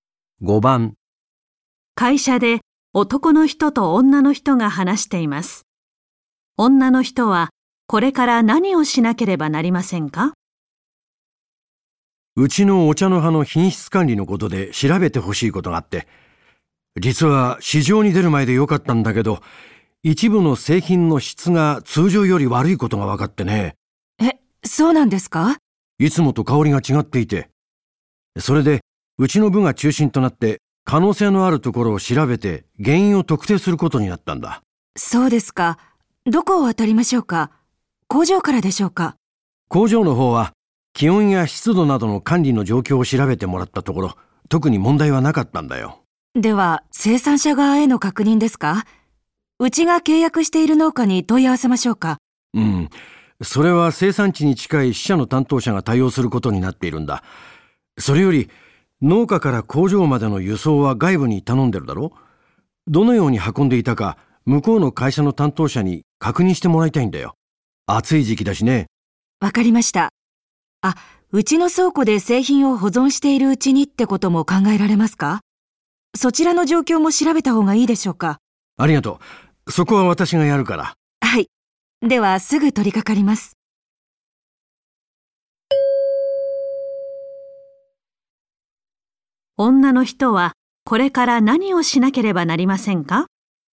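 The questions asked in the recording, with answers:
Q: 女の人はこれから何をしなければなりませんか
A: 輸送を頼んでいる会社の担当者に運び方を確認する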